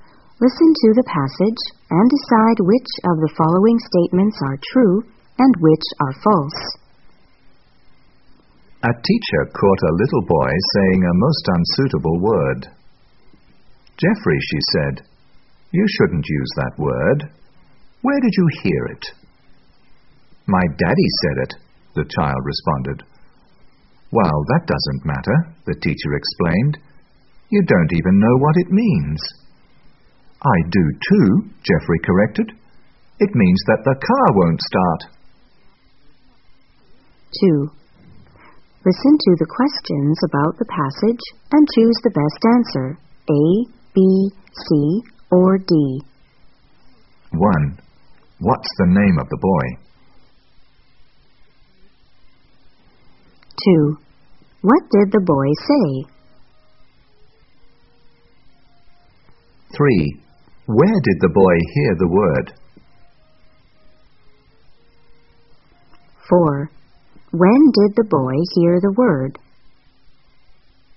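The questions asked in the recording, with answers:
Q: What's the name of the boy?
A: Jeffrey

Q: Where did the boy hear the word?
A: From his daddy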